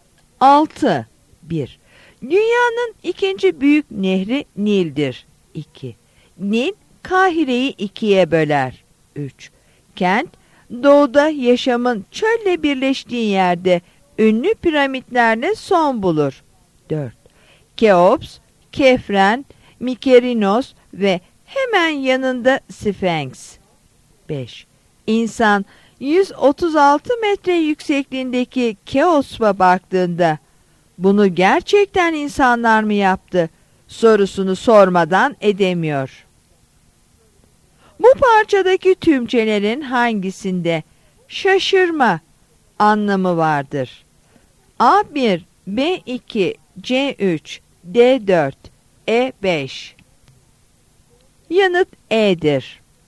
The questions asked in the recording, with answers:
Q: Bu parçadaki tümcelerin hangisinde şaşırma anlamı vardır?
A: Yanıt E'dir.